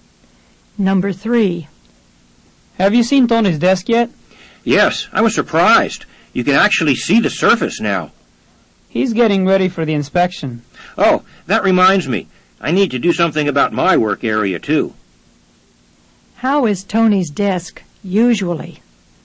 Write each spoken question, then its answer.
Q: How is Tony's desk usually?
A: Number 3 is A. Repeat. Tony's desk is usually messy.